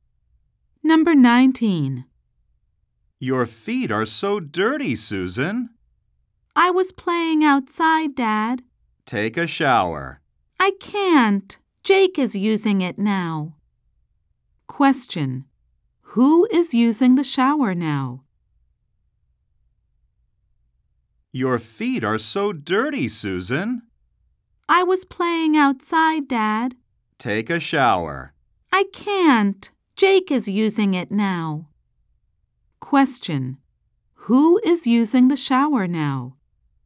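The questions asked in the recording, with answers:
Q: Who is using the shower now?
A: Jake.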